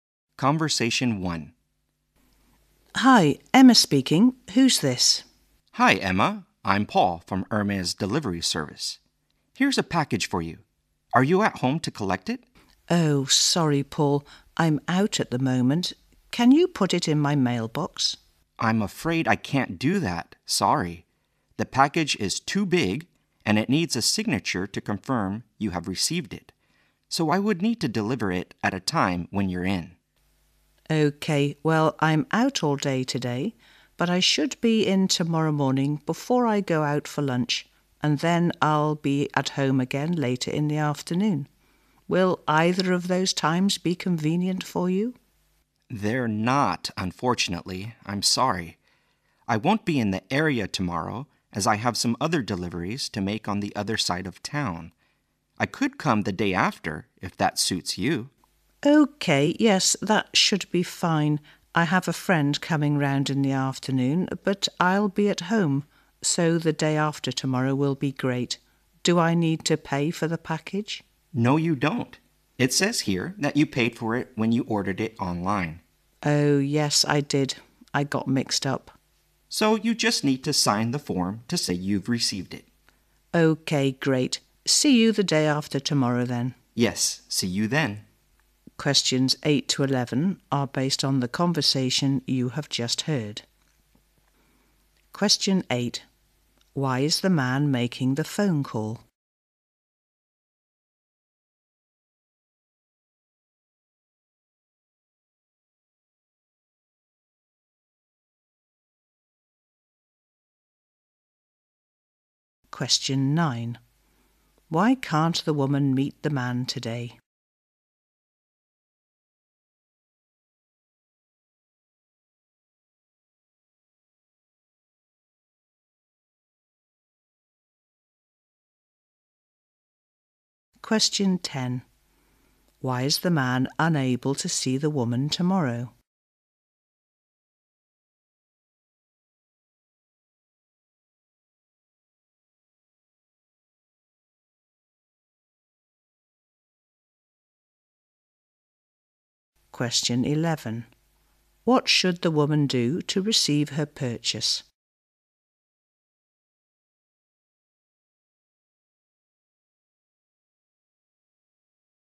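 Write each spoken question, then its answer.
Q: Why is the man making the phone call?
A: To deliver a package to her

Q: Why can't the woman meet the man today?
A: She is out all day

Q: Why is the man unable to see the woman tomorrow?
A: He has other deliveries on the other side of town

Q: What should the woman do to receive her purchase?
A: Sign the form to confirm receipt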